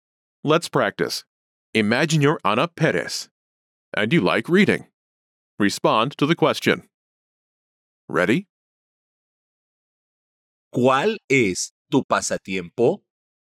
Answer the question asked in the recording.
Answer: Me gusta leer.